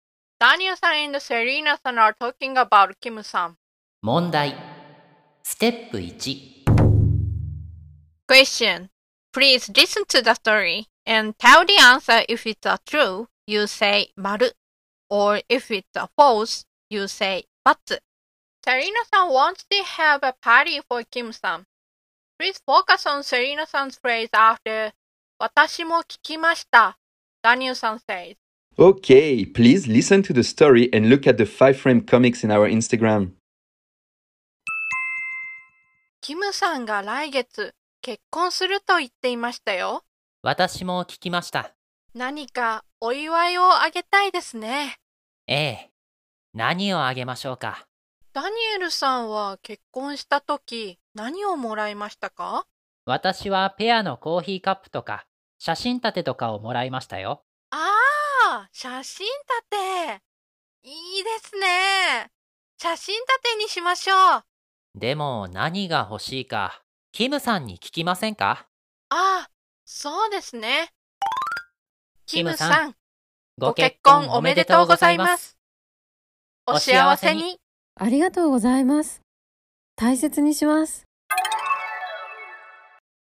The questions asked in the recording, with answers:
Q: Serena san wants to have a party for Kim san.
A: So the answer is batsu.